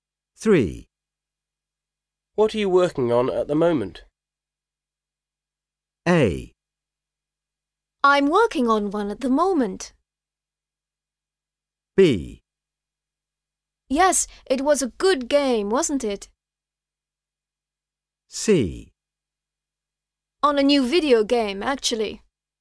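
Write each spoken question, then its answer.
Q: What are you working on at the moment?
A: C: On a new video game, actually.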